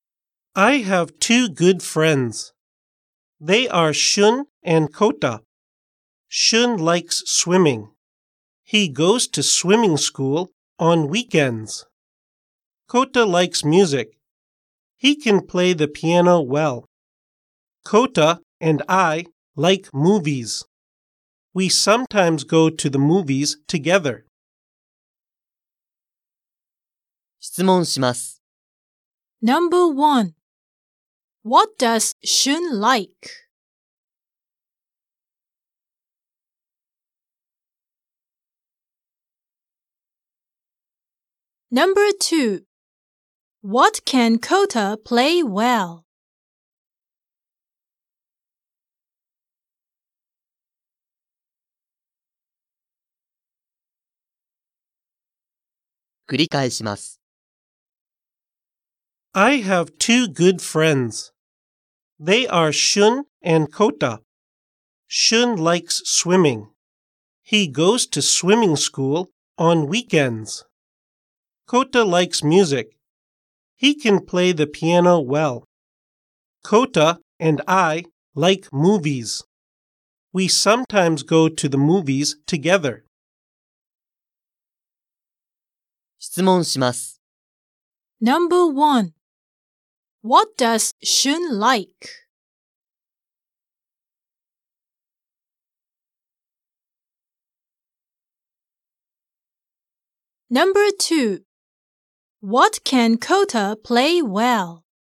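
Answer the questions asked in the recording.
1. He likes swimming.
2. He can play the piano well.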